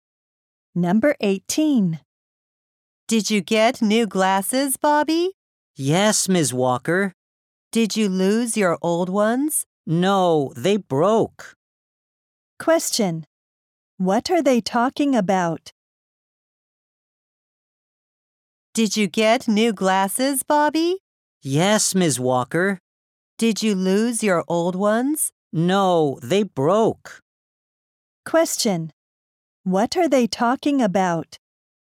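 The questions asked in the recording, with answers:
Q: What are they talking about?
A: Bobby's new glasses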